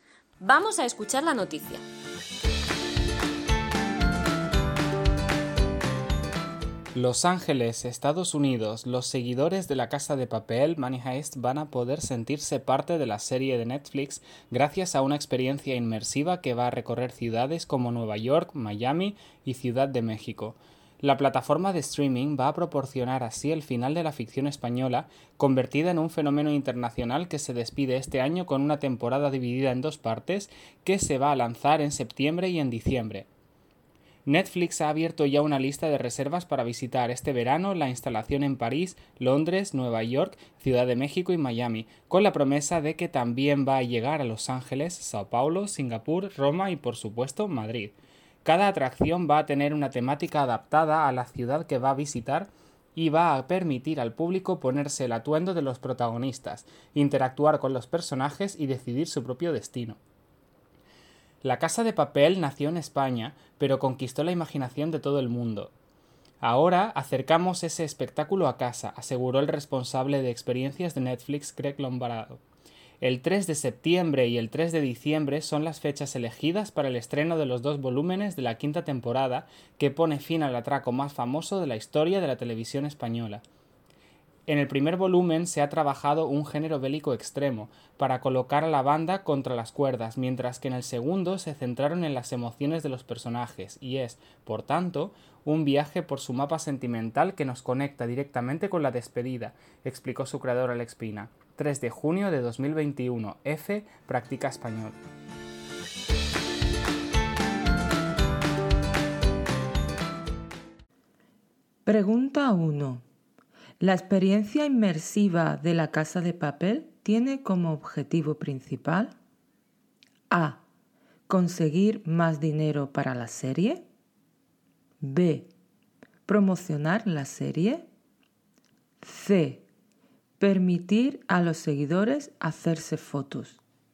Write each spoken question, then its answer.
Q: La experiencia inmersiva de la casa de papel tiene como objetivo principal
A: Respuesta 1. B. Promocionar la serie